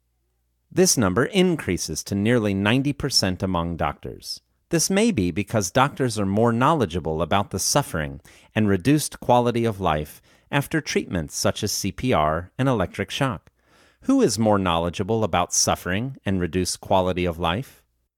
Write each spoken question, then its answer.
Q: Who is more knowledgeable about suffering and reduced quality of life?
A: Doctors are more knowledgeable about suffering and reduced quality of life.